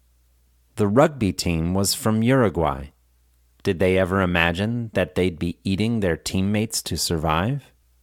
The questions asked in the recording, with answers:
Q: Did they ever imagine that they'd be eating their teammates to survive?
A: No, they didn't. They never imagined that they'd be eating their teammates to survive.